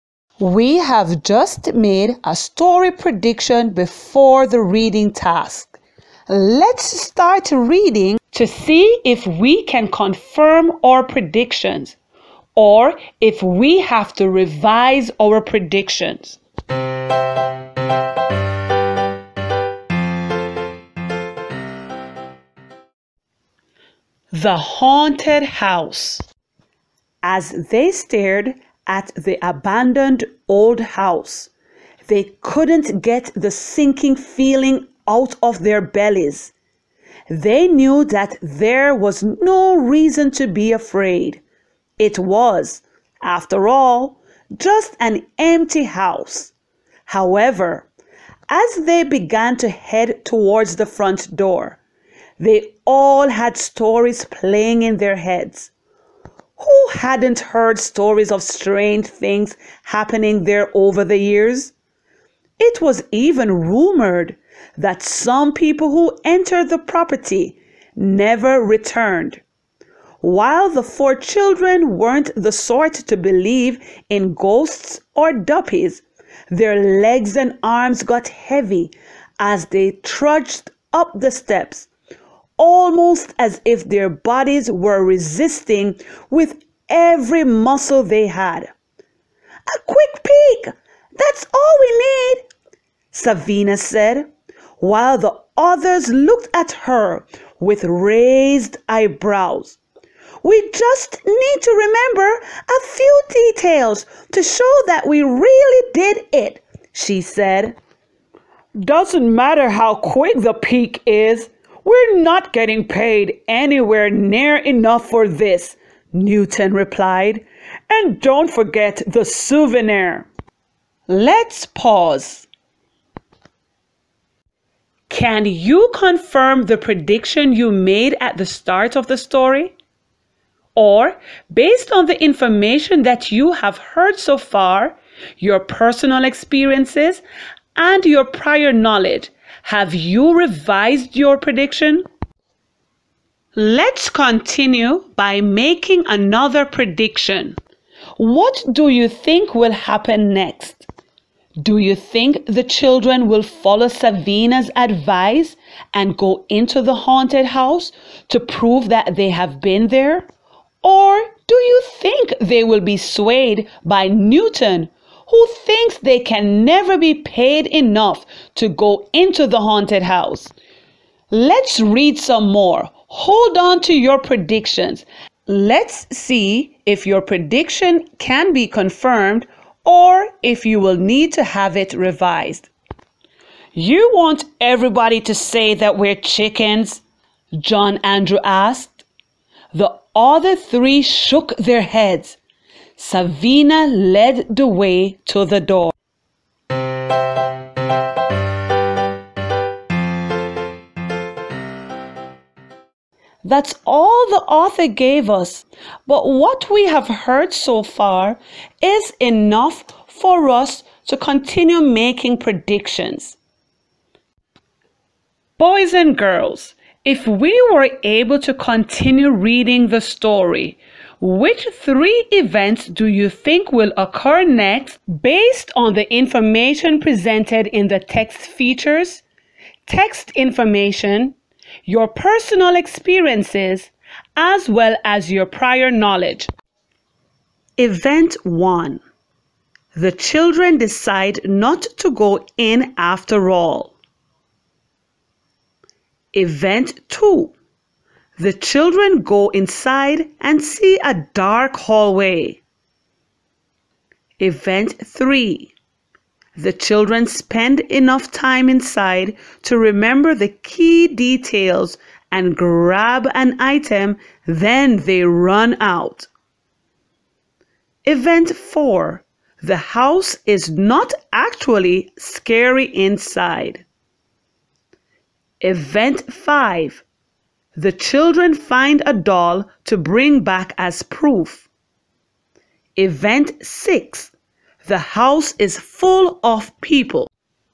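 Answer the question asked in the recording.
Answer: Events 2, 3 and 5: they go inside and see a dark hallway; they stay long enough to remember key details and grab an item, then run out; they find a doll to bring back as proof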